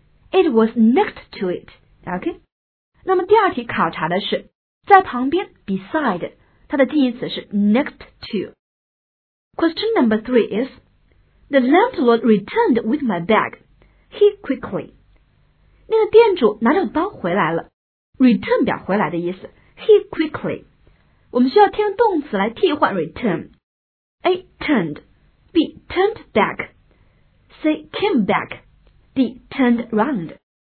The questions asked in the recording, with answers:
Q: The landlord returned with my bag. He quickly.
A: 答案应该是 C. Came back.